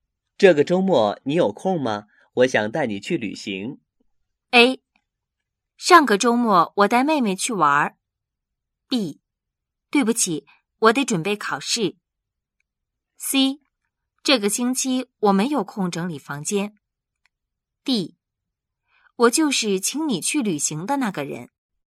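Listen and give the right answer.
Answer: B: 对不起,我得准备考试。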